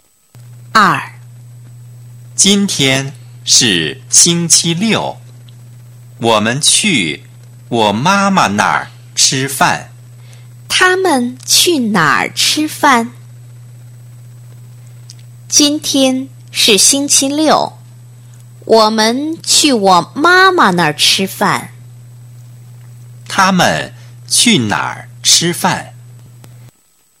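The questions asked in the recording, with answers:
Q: 他们去哪儿吃饭?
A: 他妈妈那儿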